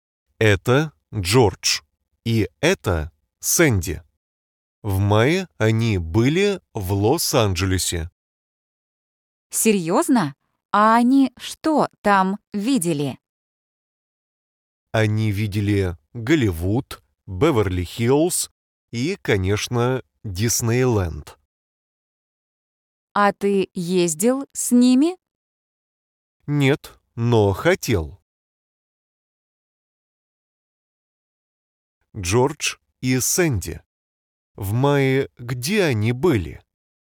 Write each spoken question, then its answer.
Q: Джордж и Сэнди. В мае где они были?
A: Они были в Лос-Анджелесе.